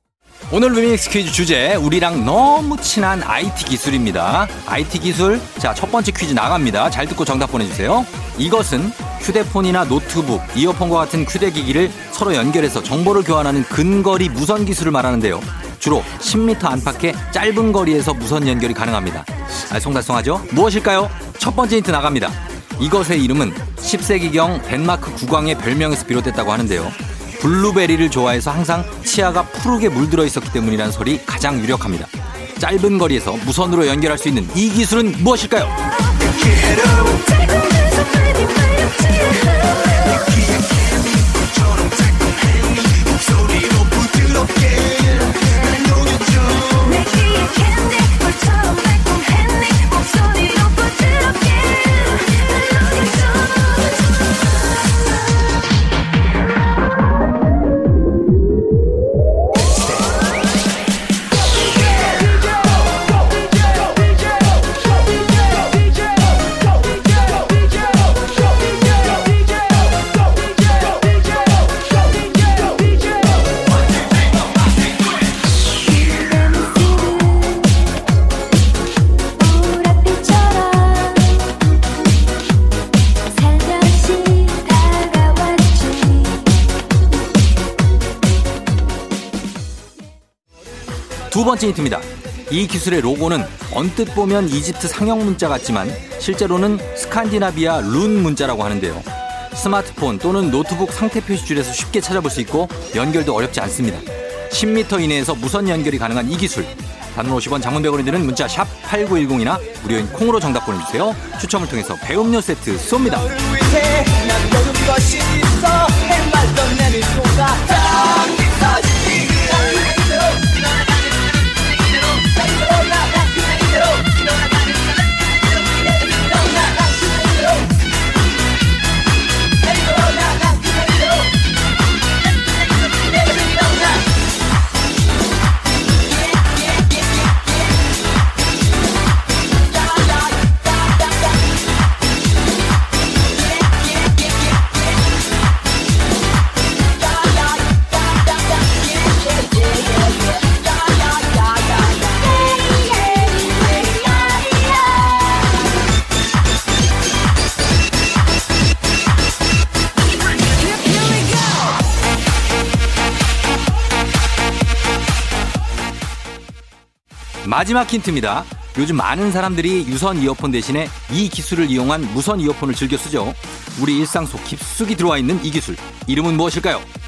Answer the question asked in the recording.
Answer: 블루투스였습니다